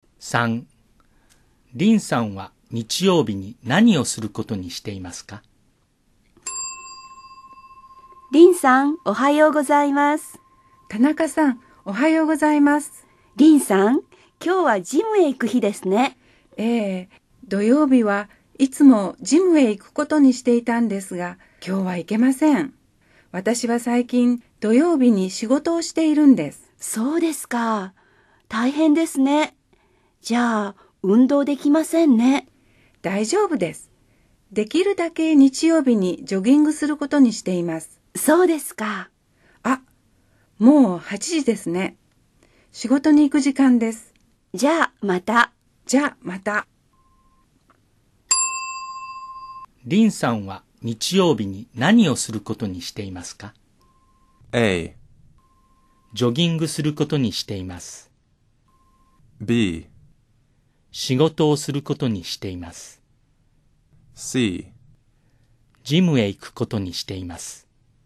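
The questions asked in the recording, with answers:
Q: リンさんは日曜日に何をすることにしていますか?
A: A: ジョギングすることにしています。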